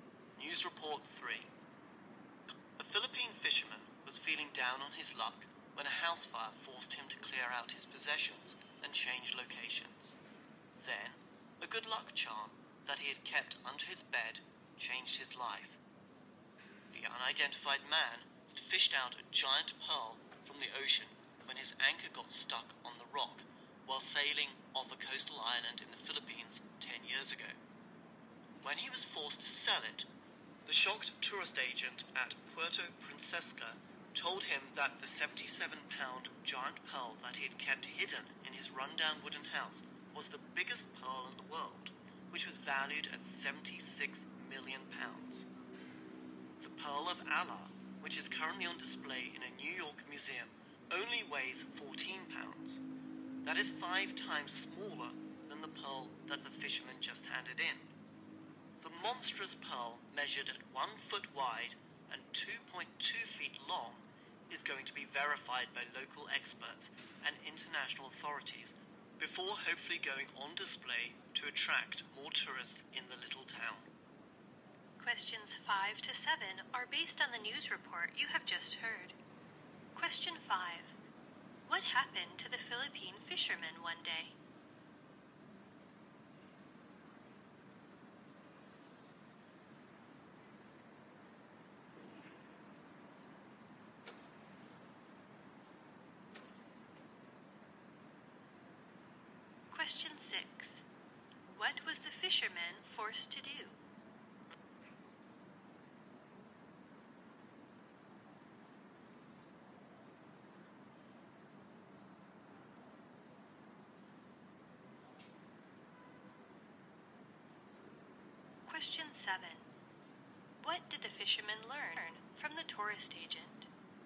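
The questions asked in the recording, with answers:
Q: What did the fisherman learn from the tourist agent?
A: His pearl was the biggest in the world, worth 76 million pounds.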